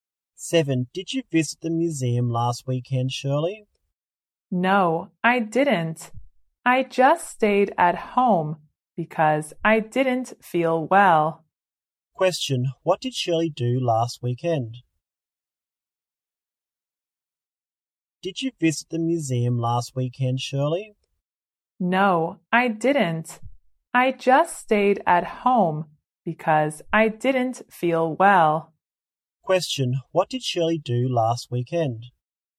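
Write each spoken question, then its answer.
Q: What did Shirley do last weekend?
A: She stayed at home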